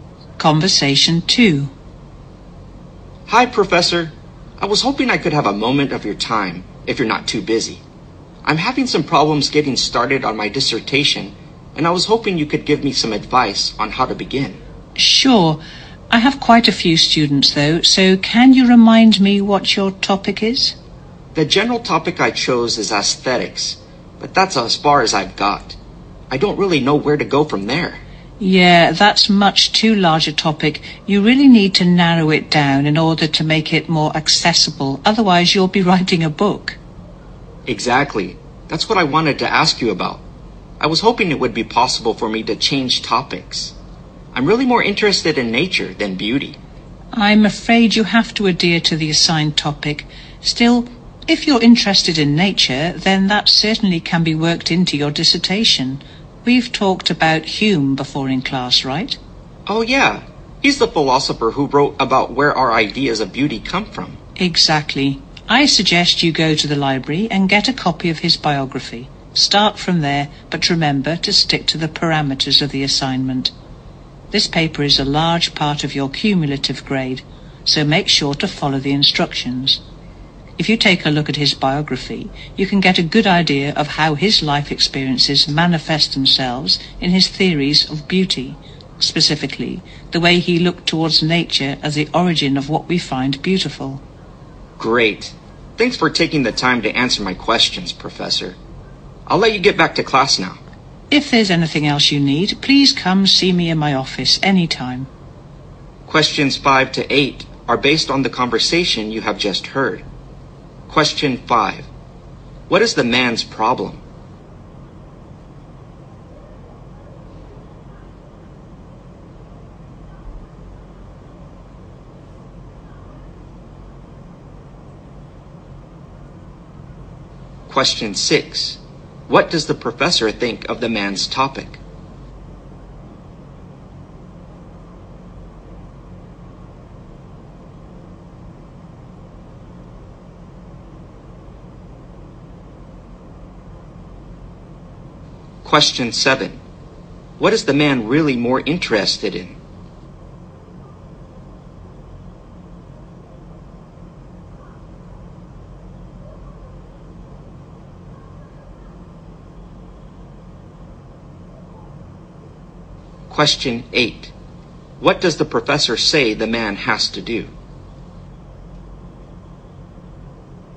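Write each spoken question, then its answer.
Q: What is the man's problem?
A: He has trouble getting started on his dissertation

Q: What does the professor think of the man's topic?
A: It is much too large and needs narrowing down

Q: What is the man really more interested in?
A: Nature

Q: What does the professor say the man has to do?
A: Stick to the assigned topic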